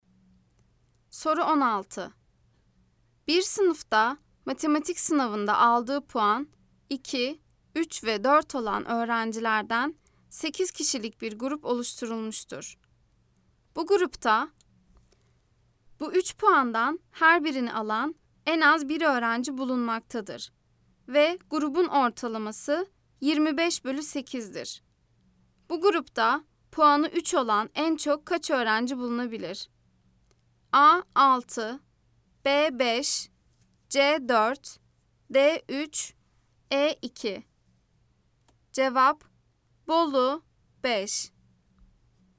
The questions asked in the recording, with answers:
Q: Bu grupta puanı 3 olan en çok kaç öğrenci bulunabilir?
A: Cevap: Bolu 5.